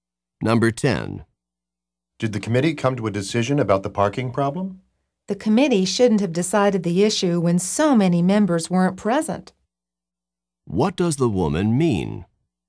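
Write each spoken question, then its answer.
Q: What does the woman mean?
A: The committee made a decision, but it shouldn't have with so many members absent.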